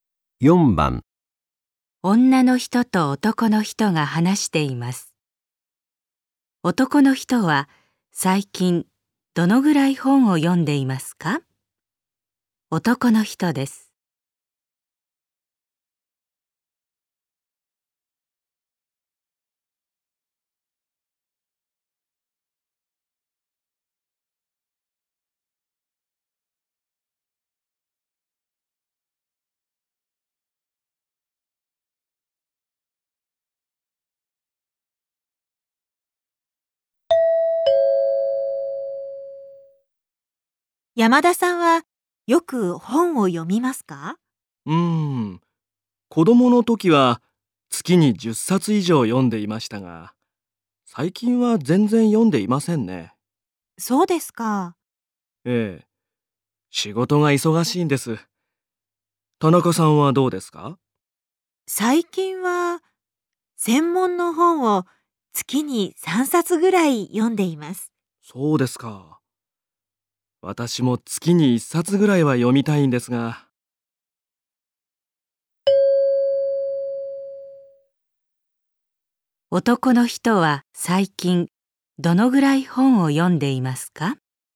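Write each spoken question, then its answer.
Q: 男の人は最近どのぐらい本を読んでいますか?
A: 全然読んでいない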